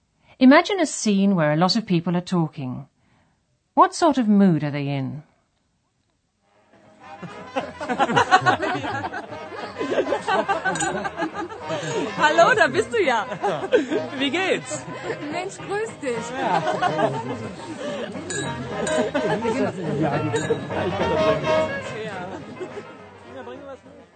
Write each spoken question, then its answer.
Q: What sort of mood are they in?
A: That was a party atmosphere where people are enjoying themselves.